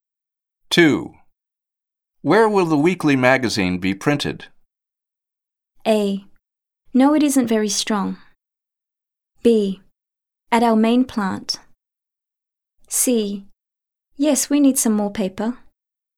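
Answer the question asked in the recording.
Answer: B: At our main plant.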